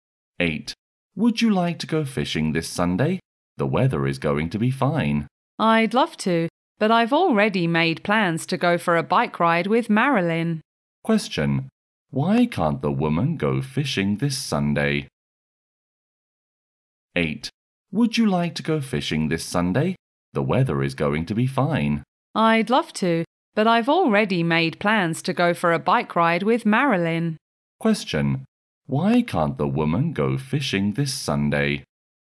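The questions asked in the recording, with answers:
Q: Why can't the woman go fishing this Sunday?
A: She has already planned a bike ride with Marilyn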